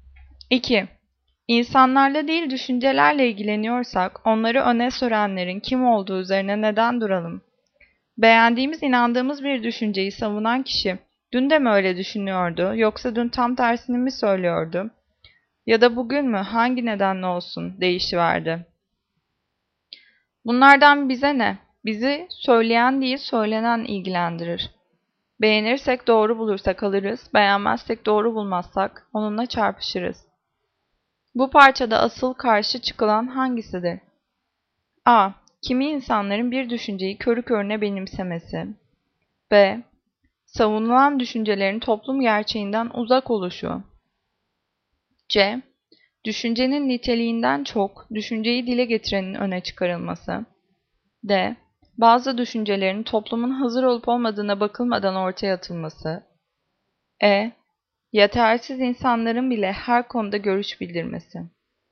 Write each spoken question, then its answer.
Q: Bu parçada asıl karşı çıkılan hangisidir?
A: Cevap C. Düşüncenin niteliğinden çok düşünceyi dile getirenin öne çıkartılması.